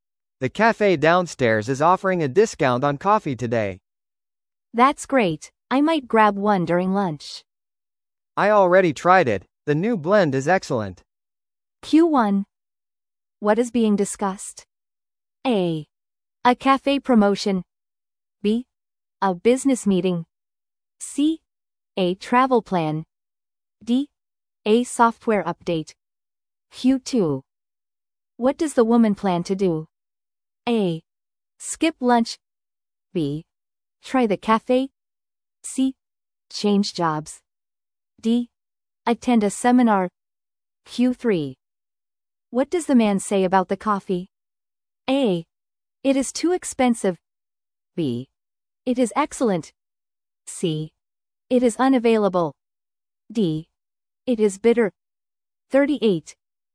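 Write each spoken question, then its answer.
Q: What is being discussed?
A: A: A cafe promotion.

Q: What does the woman plan to do?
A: B: Try the cafe.

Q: What does the man say about the coffee?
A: B: It is excellent.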